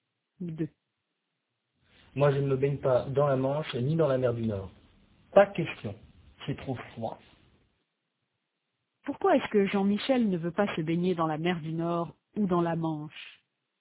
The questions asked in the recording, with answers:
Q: Pourquoi est-ce que Jean-Michel ne veut pas se baigner dans la mer du Nord ou dans la Manche?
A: Parce que c'est trop froid.